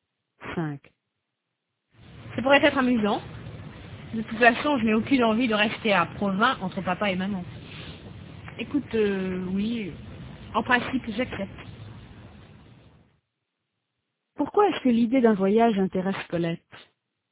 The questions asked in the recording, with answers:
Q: Pourquoi est-ce que l'idée d'un voyage intéresse Colette?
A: Parce qu'elle n'a aucune envie de rester à Provins entre papa et maman.